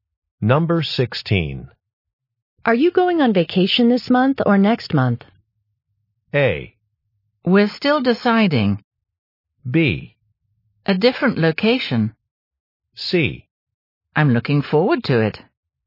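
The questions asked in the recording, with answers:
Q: Are you going on vacation this month or next month?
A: A: We're still deciding.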